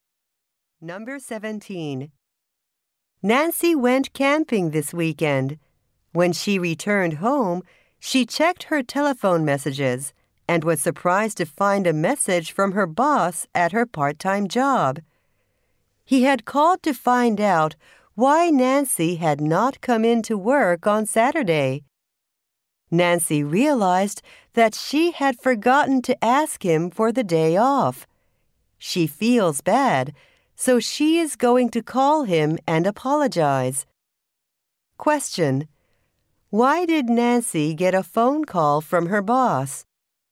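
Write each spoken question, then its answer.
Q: Why did Nancy get a phone call from her boss?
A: She didn't come in to work on Saturday.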